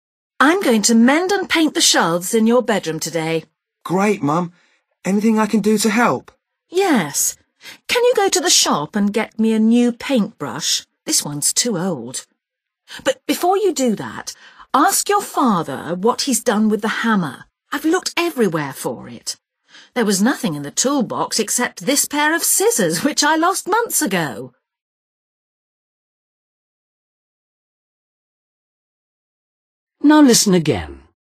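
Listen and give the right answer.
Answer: the hammer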